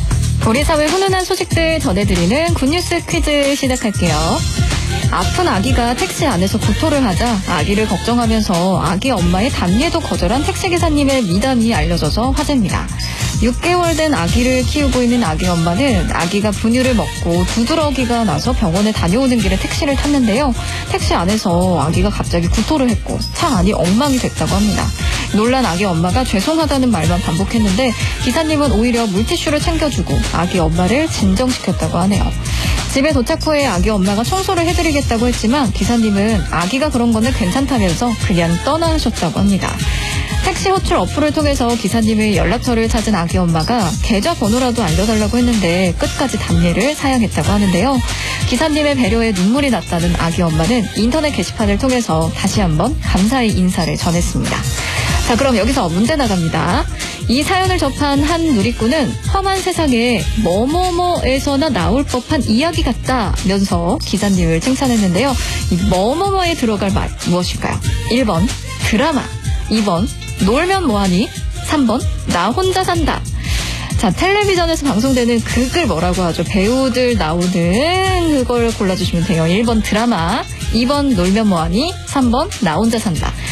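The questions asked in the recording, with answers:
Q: 이 뭐뭐뭐에 들어갈 말 무엇일까요?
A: 1번: 드라마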